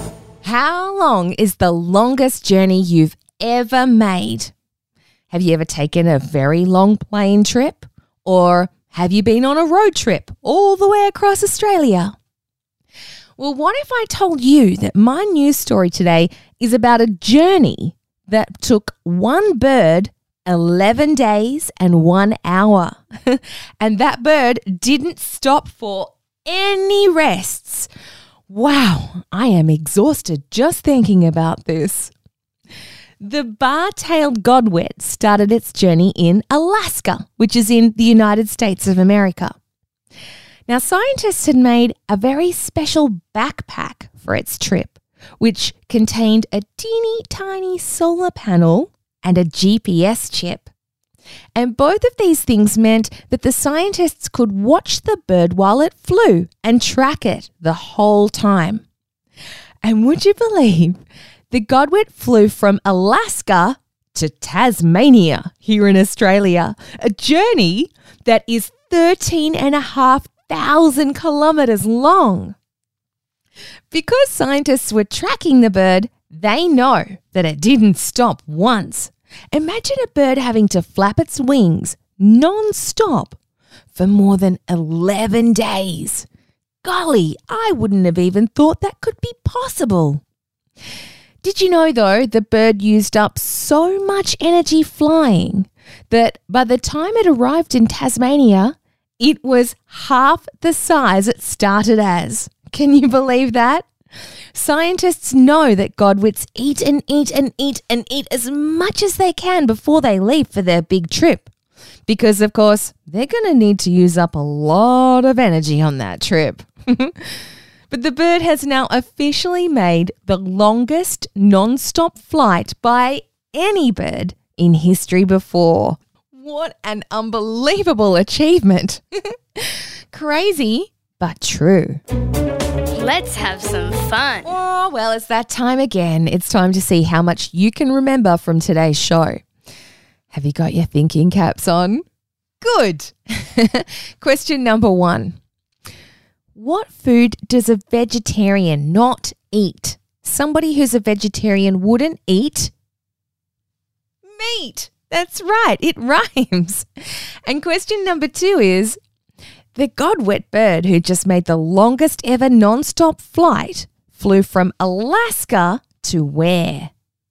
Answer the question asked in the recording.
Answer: Yes, right here in Australia.